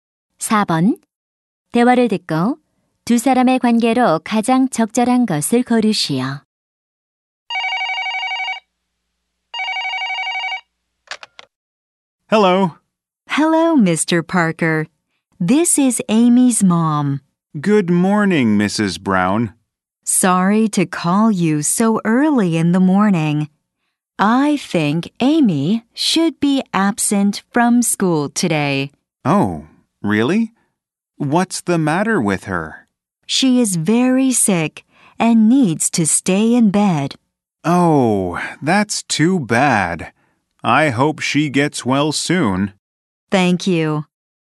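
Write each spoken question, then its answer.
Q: 대화를 듣고 두 사람의 관계로 가장 적절한 것을 고르시오.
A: 교사 - 학부모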